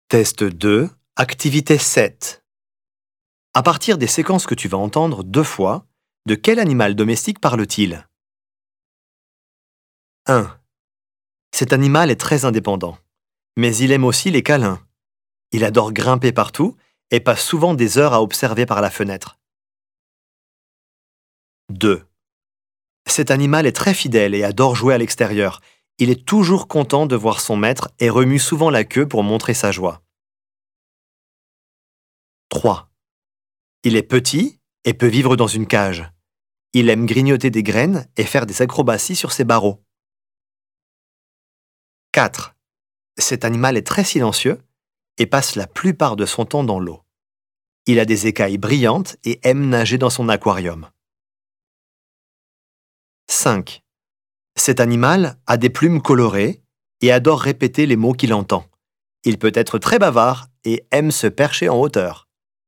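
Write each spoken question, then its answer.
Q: de quel animal domestique parle-t-il?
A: le chat

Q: de quel animal domestique parle-t-il?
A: le chien

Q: de quel animal domestique parle-t-il?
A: le poisson

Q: de quel animal domestique parle-t-il?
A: le perroquet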